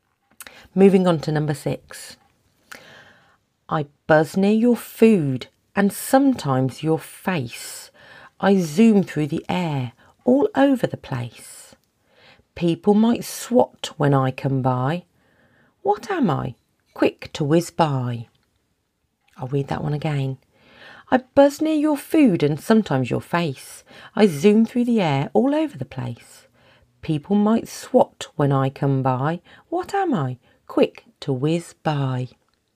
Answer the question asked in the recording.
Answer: That's a fly.